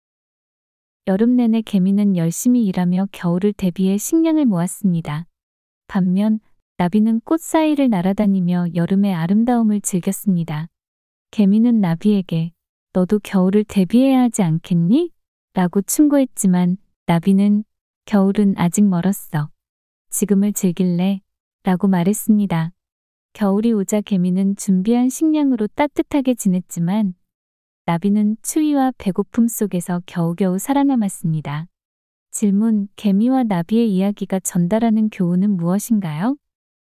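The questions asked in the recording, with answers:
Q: 개미와 나비의 이야기가 전달하는 교훈은 무엇인가요?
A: 미래를 위해 미리 준비해야 한다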